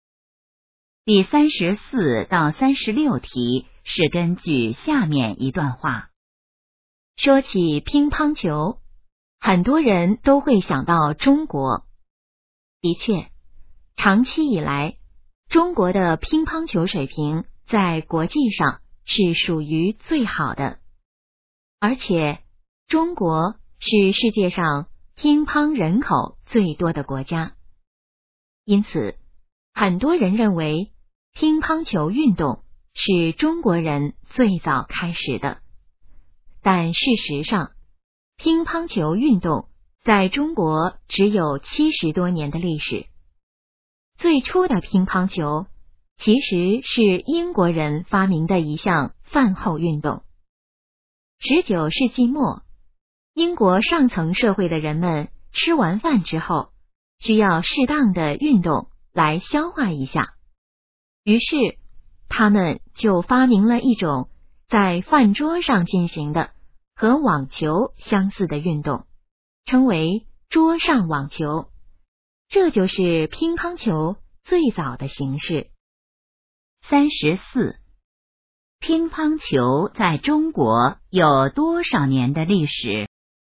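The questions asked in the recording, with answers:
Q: 乒乓球在中国有多少年的历史?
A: 70多年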